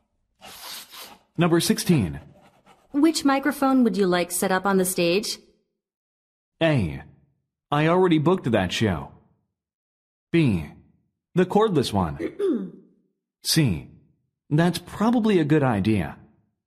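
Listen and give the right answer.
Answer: B: The cordless one.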